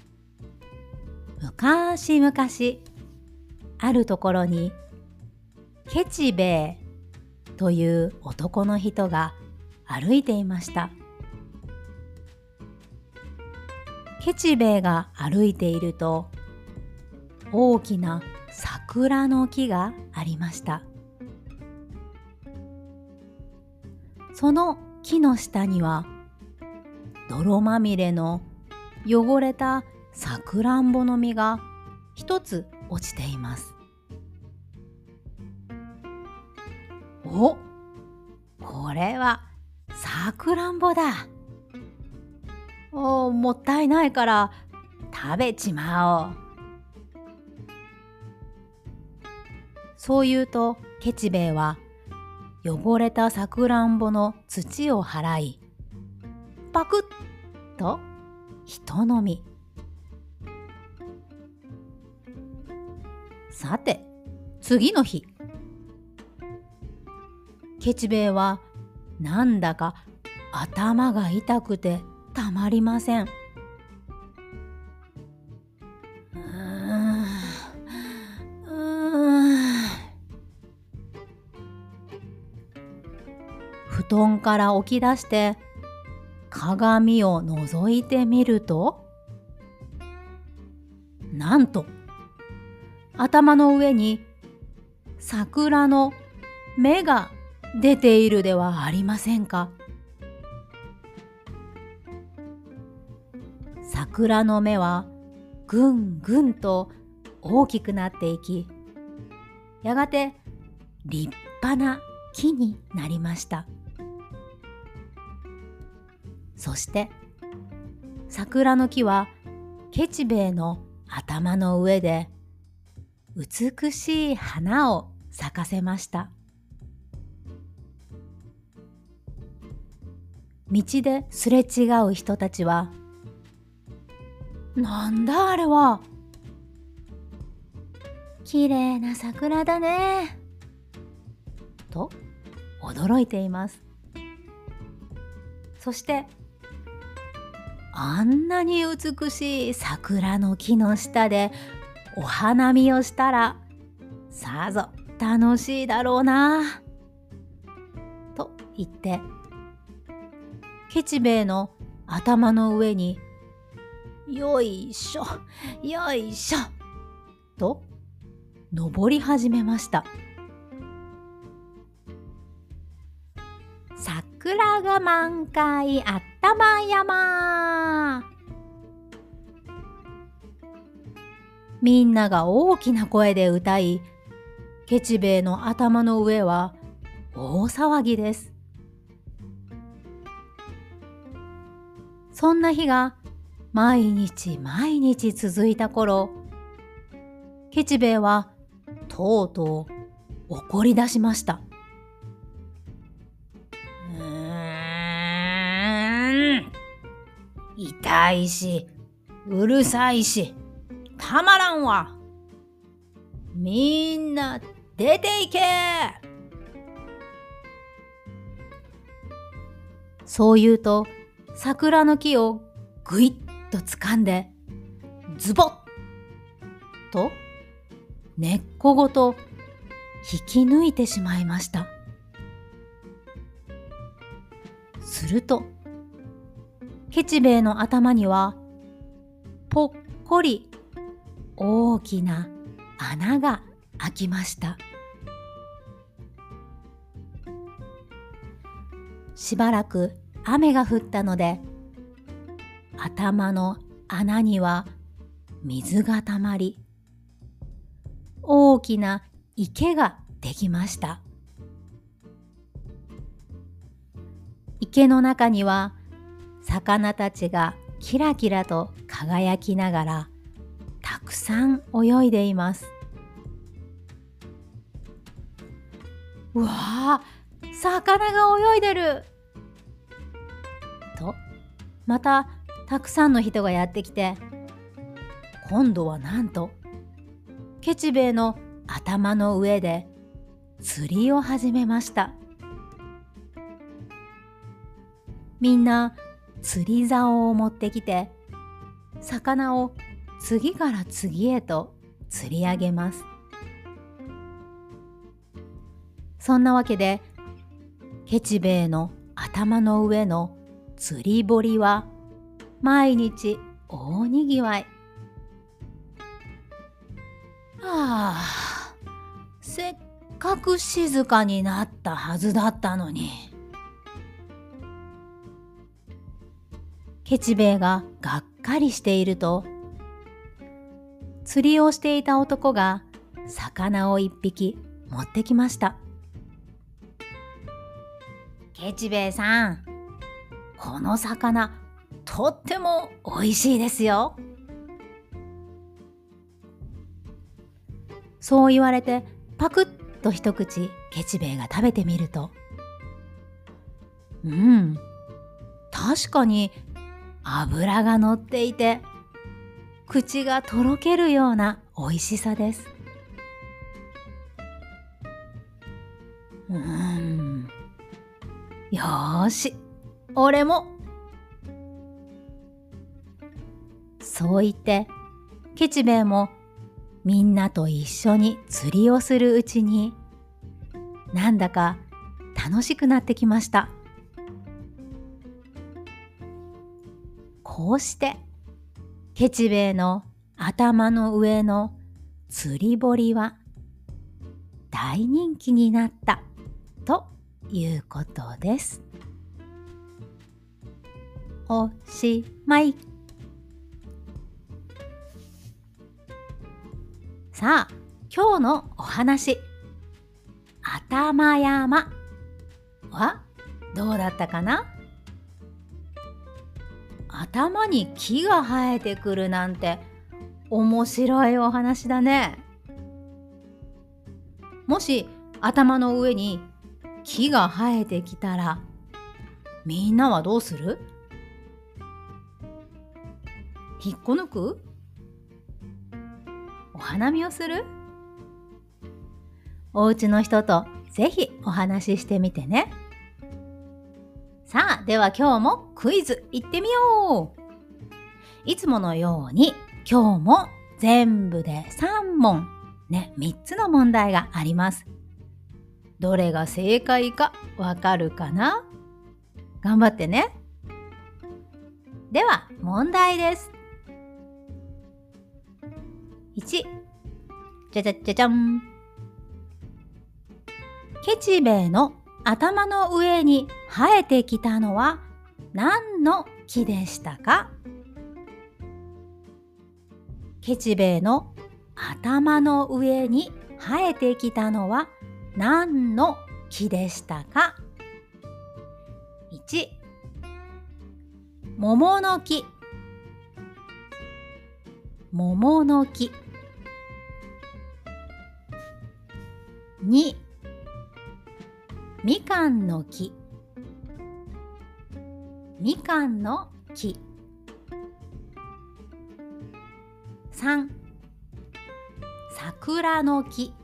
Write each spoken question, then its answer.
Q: ケチベイの頭の上に生えてきたのは何の木でしたか?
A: 3 番の桜の木でした。